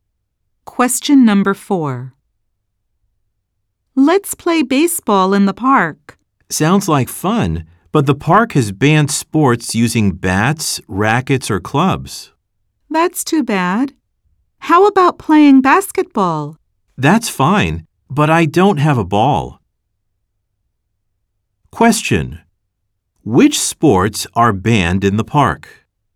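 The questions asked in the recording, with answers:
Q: Which sports are banned in the park?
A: Sports using bats, rackets, or clubs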